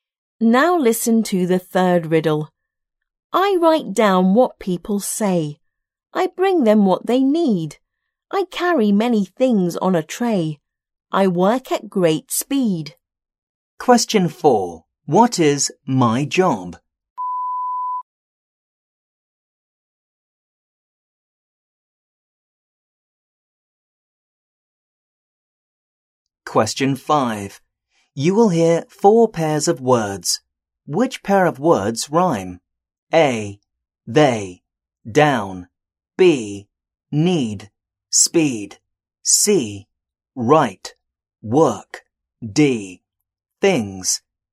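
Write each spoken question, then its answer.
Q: What is my job?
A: a waiter

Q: Which pair of words rhyme?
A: B: Need. Speed.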